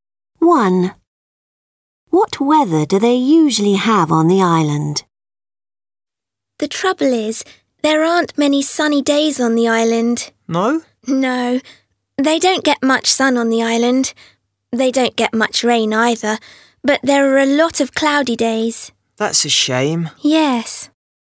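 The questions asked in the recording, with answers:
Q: What weather do they usually have on the island?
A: Cloudy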